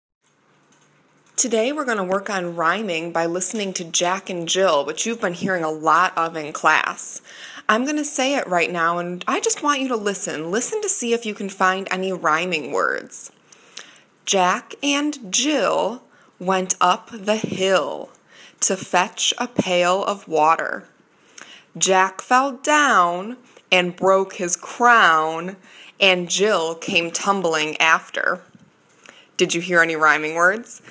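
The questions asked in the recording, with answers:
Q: Did you hear any rhyming words?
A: Yes: Jill and hill, down and crown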